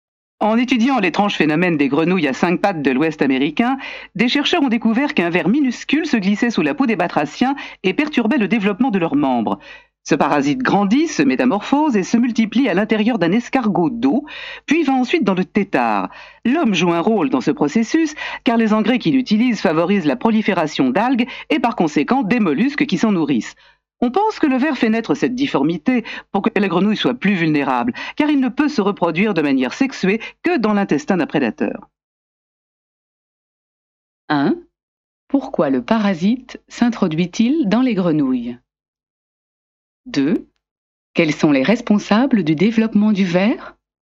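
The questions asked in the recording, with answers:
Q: Pourquoi le parasite s'introduit-il dans les grenouilles?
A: Pour déformer la grenouille et la rendre plus vulnérable aux prédateurs, car il ne peut se reproduire de manière sexuée que dans l'intestin d'un prédateur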